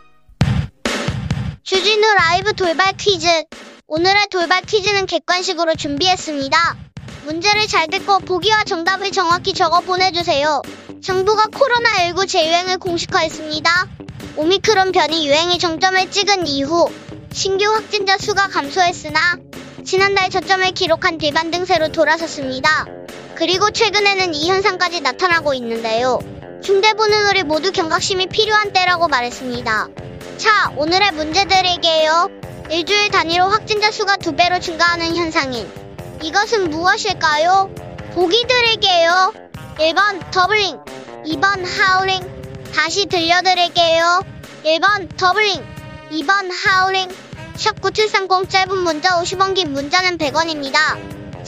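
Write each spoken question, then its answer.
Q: 일주일 단위로 확진자 수가 두 배로 증가하는 현상인 이것은 무엇일까요?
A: 1: 더블링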